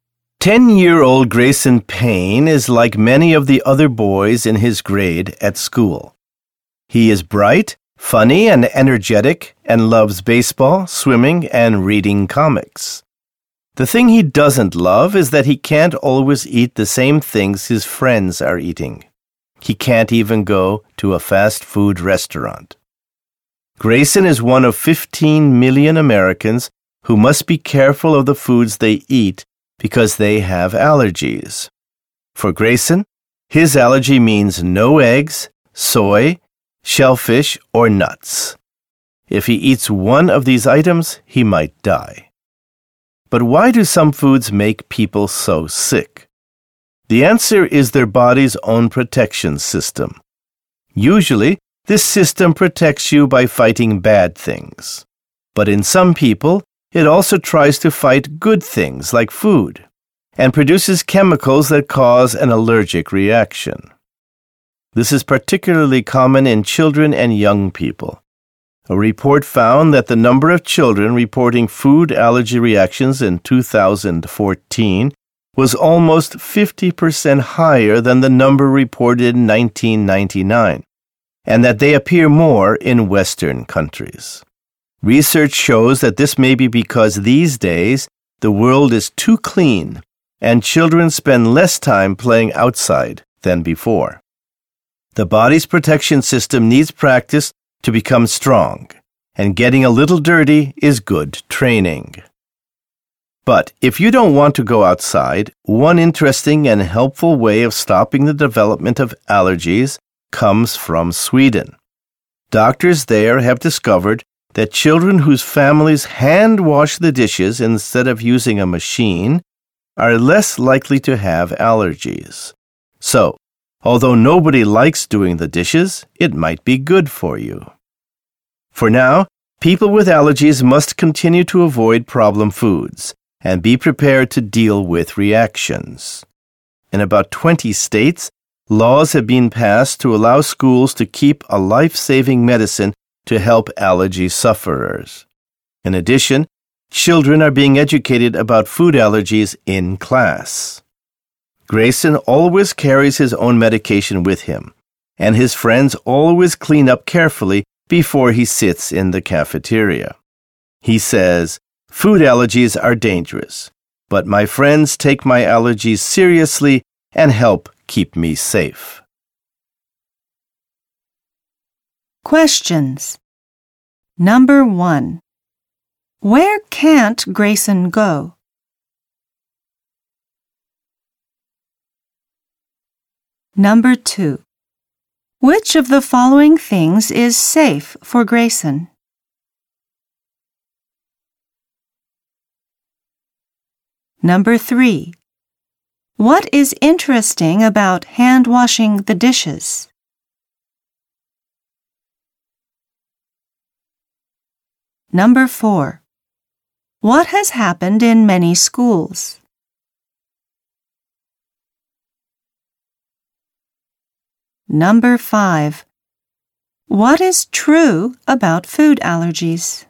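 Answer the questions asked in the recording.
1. A fast food restaurant
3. Children whose families hand wash dishes are less likely to have allergies
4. Laws allow schools to keep life-saving medicine for allergy sufferers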